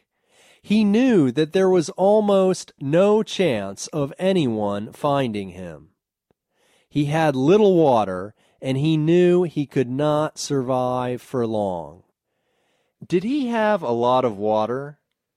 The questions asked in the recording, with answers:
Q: Did he have a lot of water?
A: No, he didn't have a lot of water.